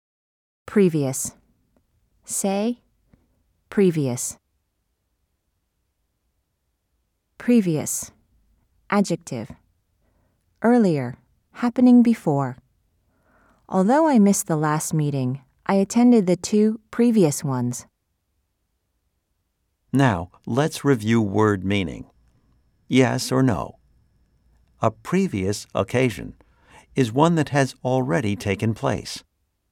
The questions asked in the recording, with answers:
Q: Yes or no? A previous occasion is one that has already taken place.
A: If you said yes, you are correct.